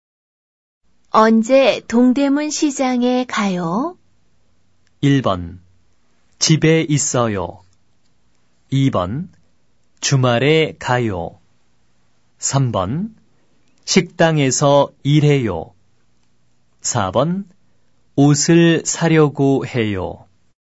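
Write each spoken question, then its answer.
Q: 언제 동대문 시장에 가요?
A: 2: 주말에 가요.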